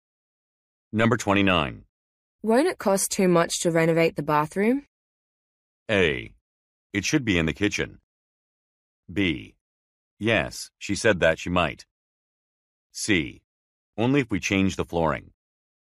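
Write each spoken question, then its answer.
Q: Won't it cost too much to renovate the bathroom?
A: C: Only if we change the flooring.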